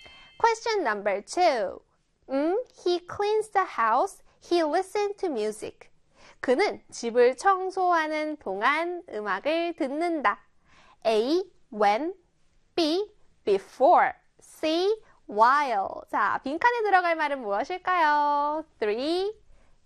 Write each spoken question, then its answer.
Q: 자, 빈칸에 들어갈 말은 무엇일까요?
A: 그렇죠. C의 while입니다.